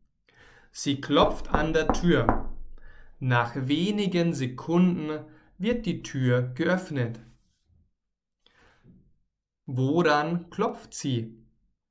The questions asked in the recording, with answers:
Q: Woran klopft sie?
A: An der Tür. Miriam klopft an der Tür.